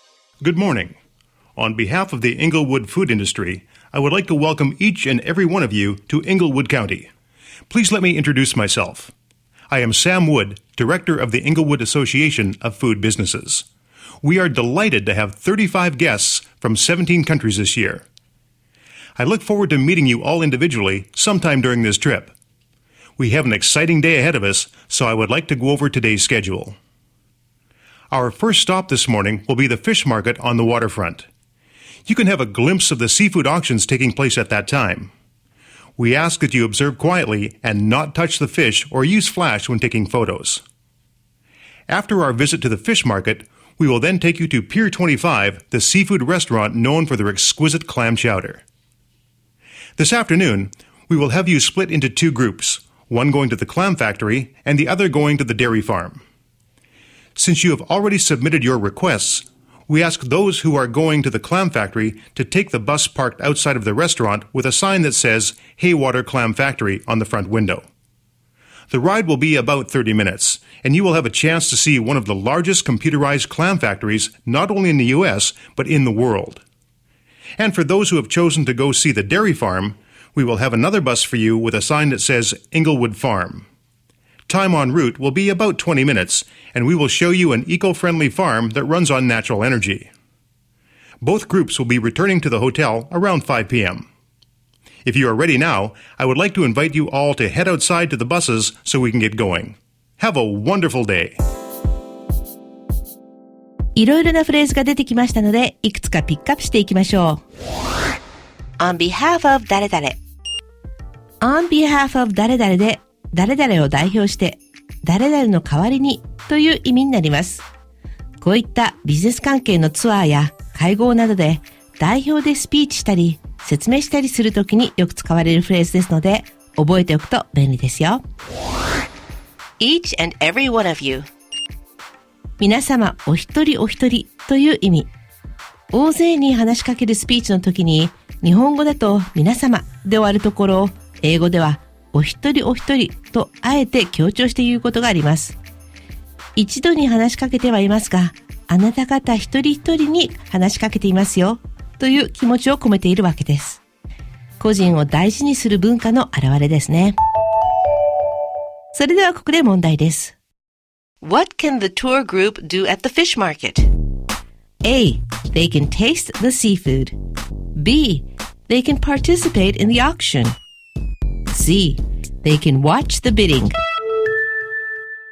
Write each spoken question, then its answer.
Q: What can the tour group do at the fish market?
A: ですので C の競りを見ることができるが正解です。